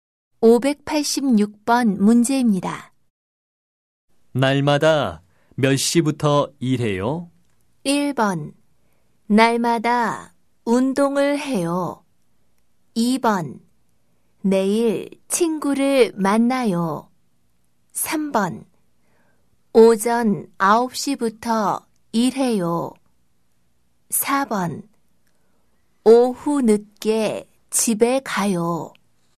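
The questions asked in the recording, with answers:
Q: 날마다 몇 시부터 일해요?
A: 3: 오전 9시부터 일해요.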